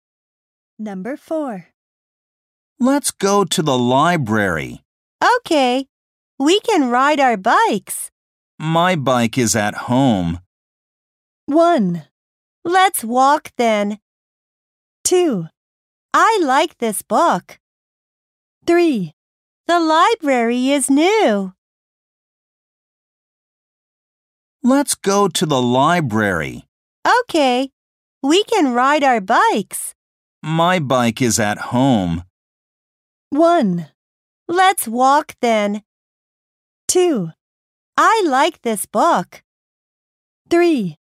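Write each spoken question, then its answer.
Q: My bike is at home.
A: 1: Let's walk then.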